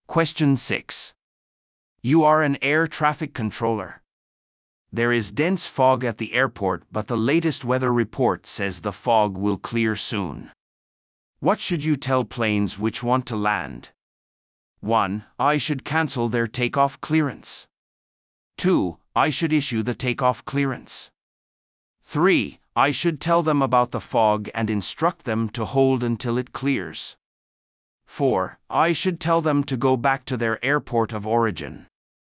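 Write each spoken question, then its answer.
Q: What should you tell planes which want to land?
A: 3: I should tell them about the fog and instruct them to hold until it clears.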